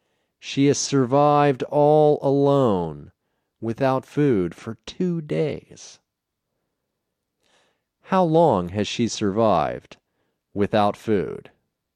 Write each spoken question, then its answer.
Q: How long has she survived without food?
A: She has survived without food for 2 days.